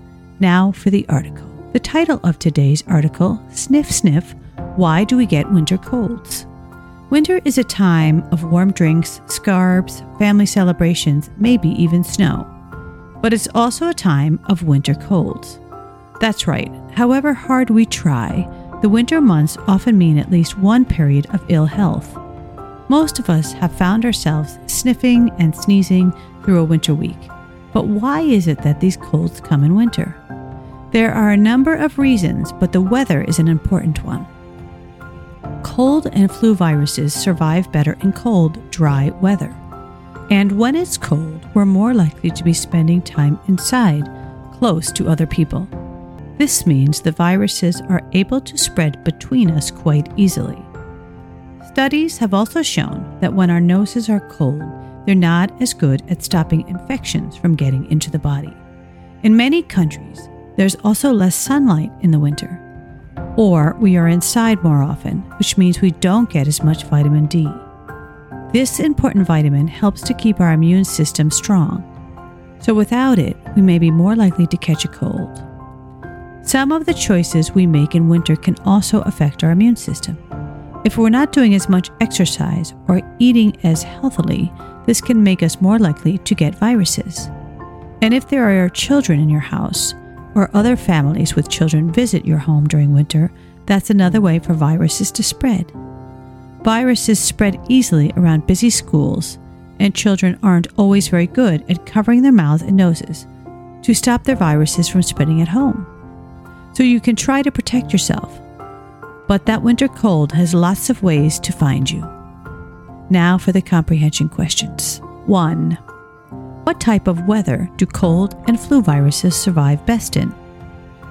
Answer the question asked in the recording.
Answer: Cold, dry weather.